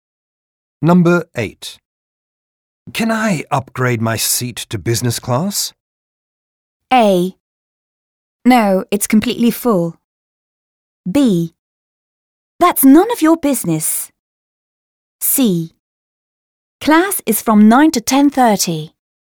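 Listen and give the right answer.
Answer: A: No, it's completely full.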